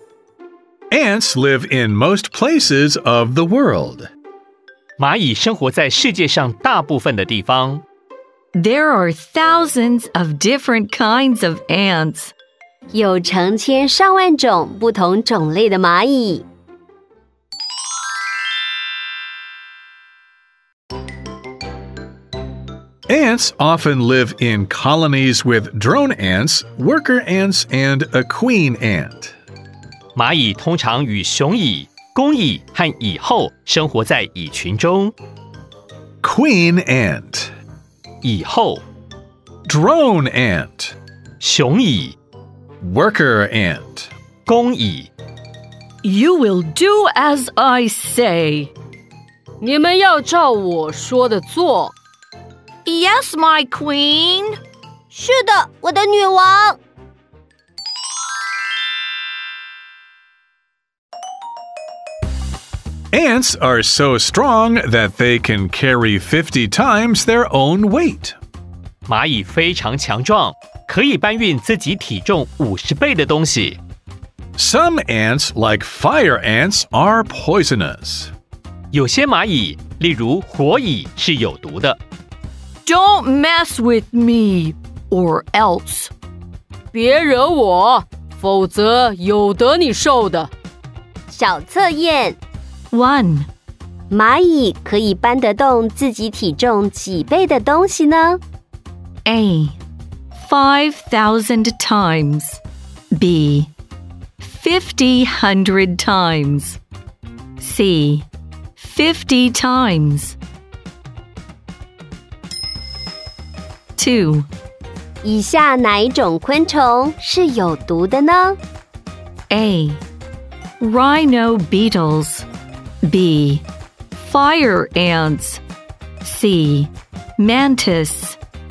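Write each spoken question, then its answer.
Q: 蚂蚁可以搬得动自己体重几倍的东西呢?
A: C: 50 times.

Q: 以下哪一种昆虫是有毒的呢?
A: B: Fire ants.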